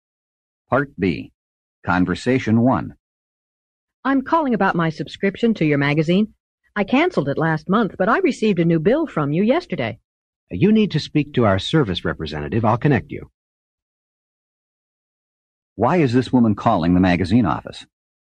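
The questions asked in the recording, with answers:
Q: Why is this woman calling the magazine office?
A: She got a bill after canceling her subscription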